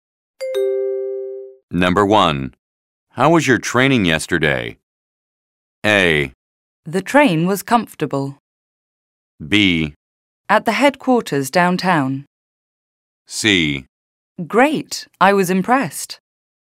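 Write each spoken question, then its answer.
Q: How was your training yesterday?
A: C: Great, I was impressed.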